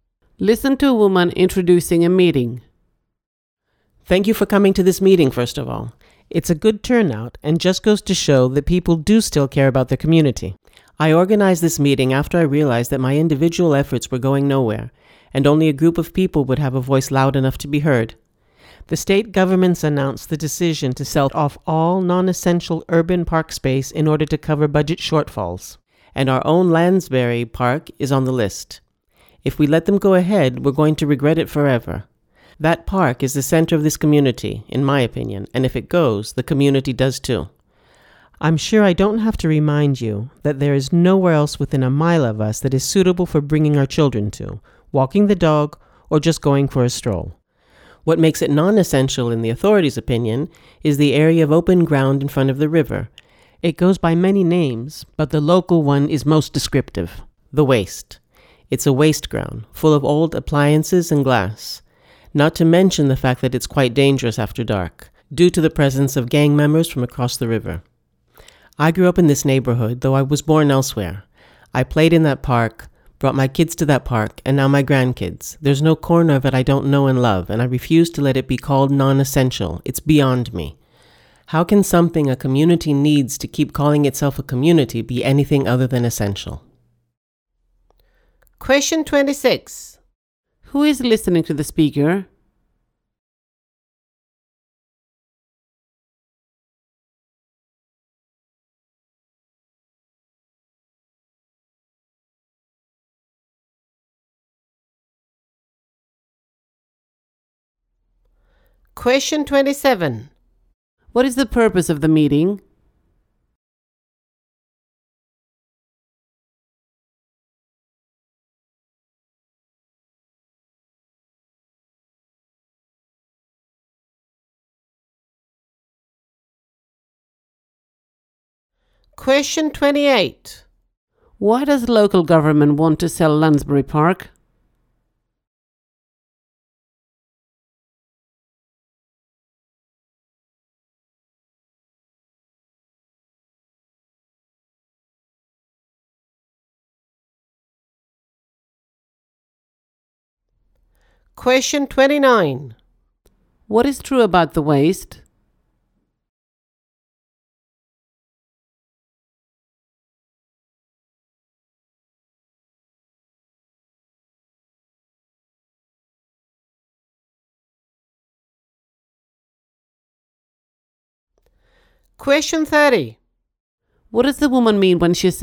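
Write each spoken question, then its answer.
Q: Why does local government want to sell Lansbury Park?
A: To cover budget shortfalls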